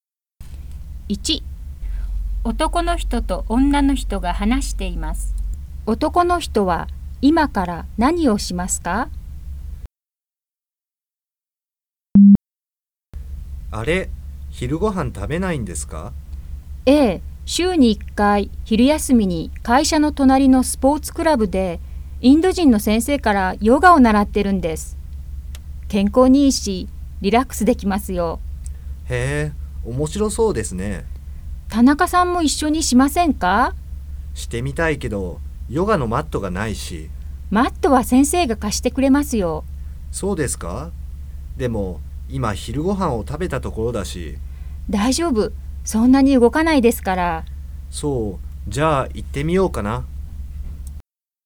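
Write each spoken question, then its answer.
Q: 男の人は今から何をしますか?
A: ヨガを習いに行く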